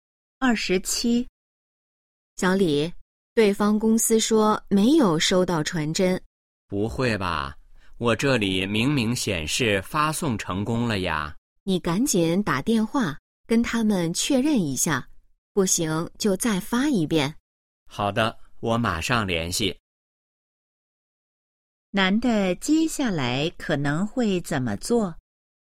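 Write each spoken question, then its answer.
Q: 男的接下来可能会怎么做?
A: 打电话跟对方公司确认(传真是否收到)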